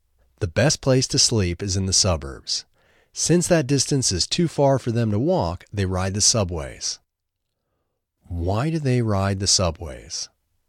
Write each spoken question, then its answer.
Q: Why do they ride the subways?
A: They ride the subways because the distance is too far for them to walk.